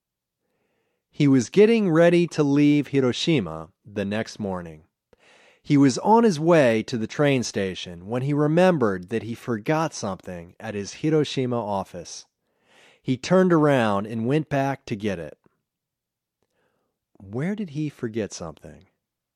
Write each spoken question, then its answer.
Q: Where did he forget something?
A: He forgot something at his Hiroshima office.